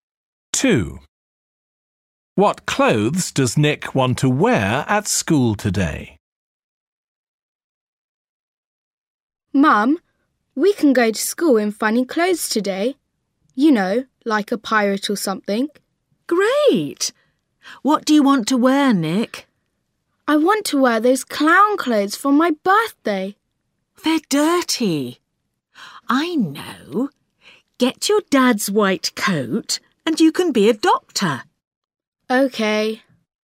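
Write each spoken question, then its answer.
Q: What clothes does Nick want to wear at school today?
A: Doctor's clothes (his dad's white coat)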